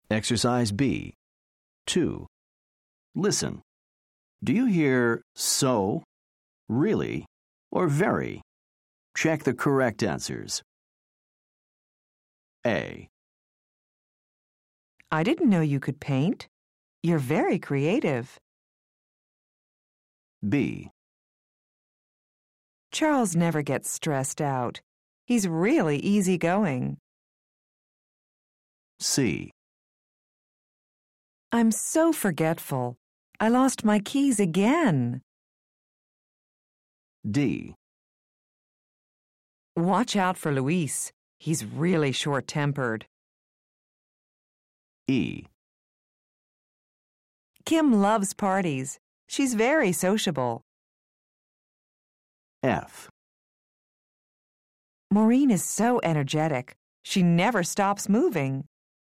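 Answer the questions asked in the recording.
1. very
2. really
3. so
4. really
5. very
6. so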